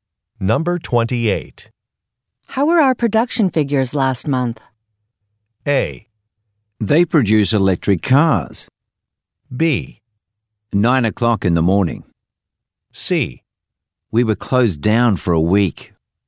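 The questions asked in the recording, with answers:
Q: How were our production figures last month?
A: C: We were closed down for a week.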